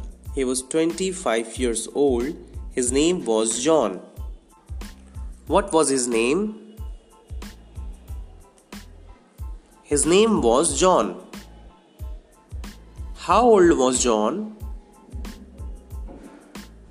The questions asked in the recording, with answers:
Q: How old was John?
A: John was 25 years old.